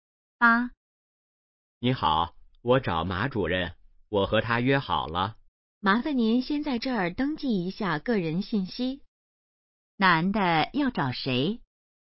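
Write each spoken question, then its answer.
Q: 男的要找谁?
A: 马主任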